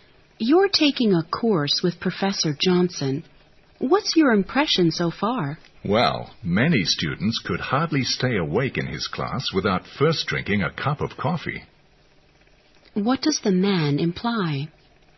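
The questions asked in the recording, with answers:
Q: What does the man imply?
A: Professor Johnson's lectures are boring.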